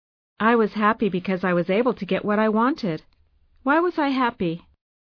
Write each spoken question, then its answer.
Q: Why was I happy?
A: Because you were able to get what you wanted.